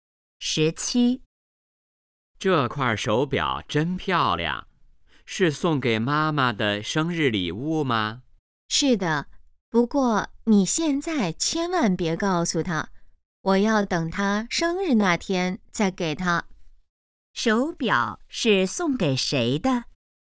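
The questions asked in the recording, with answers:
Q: 手表是送给谁的?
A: 妈妈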